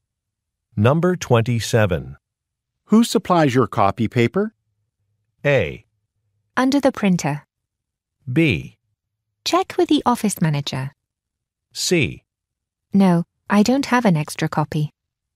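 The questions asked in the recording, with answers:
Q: Who supplies your copy paper?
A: B: Check with the office manager.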